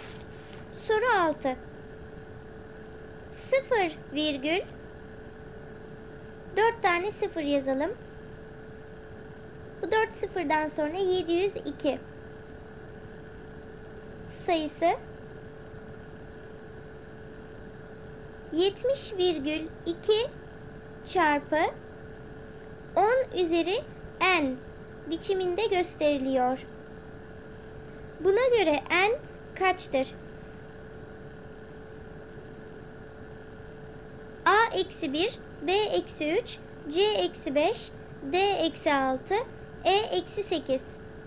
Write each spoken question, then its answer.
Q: Buna göre n kaçtır?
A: Doğru cevap D eksi 6.